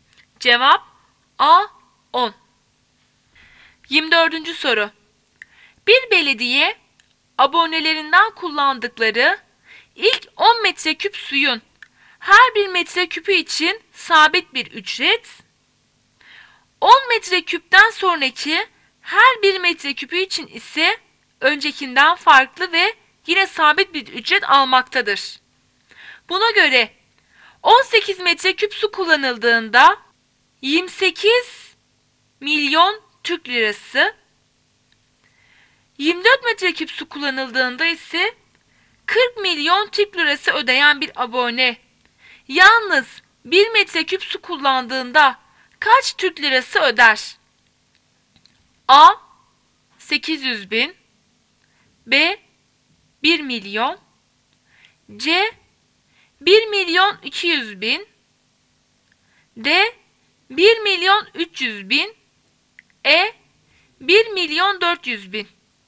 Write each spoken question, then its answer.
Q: Buna göre 18 metreküp su kullanıldığında 28 milyon Türk lirası, 24 metreküp su kullanıldığında ise 40 milyon Türk lirası ödeyen bir abone yalnız 1 metreküp su kullandığında kaç Türk lirası öder?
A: Cevap C 1 milyon 200 bin.